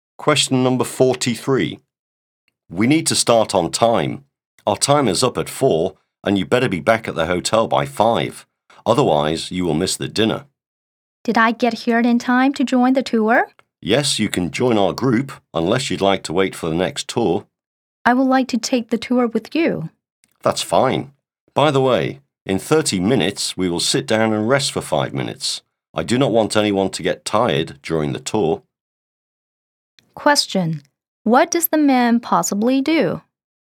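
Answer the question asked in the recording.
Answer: He is a tour guide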